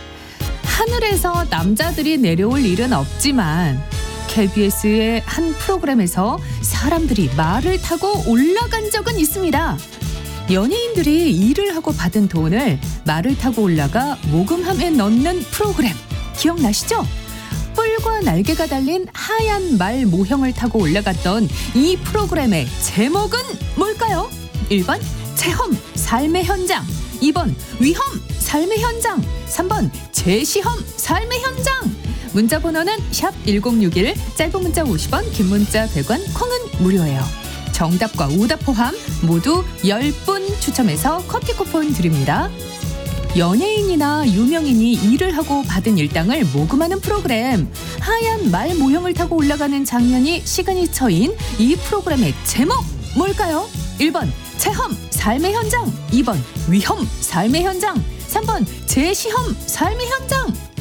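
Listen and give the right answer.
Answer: 1번: 체험 삶의 현장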